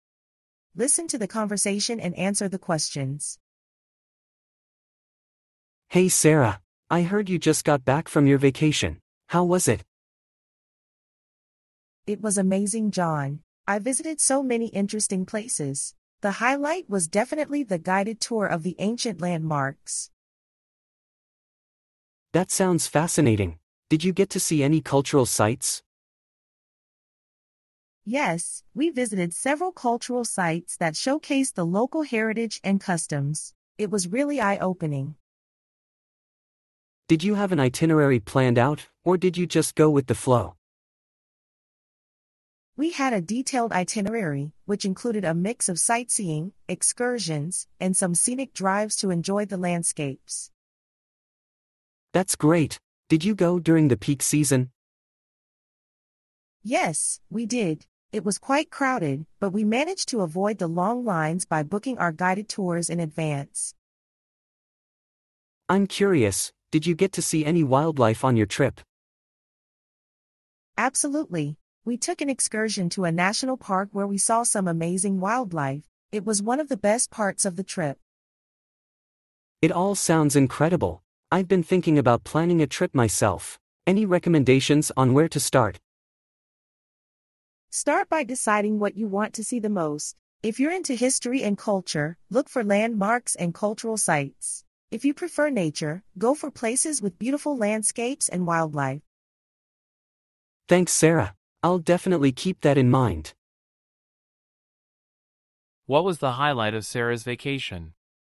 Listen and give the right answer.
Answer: The guided tour of ancient landmarks.